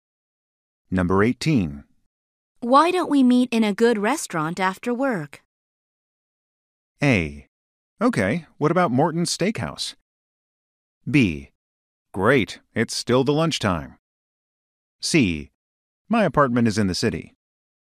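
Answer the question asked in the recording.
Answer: A: Okay, what about Morton's Steakhouse?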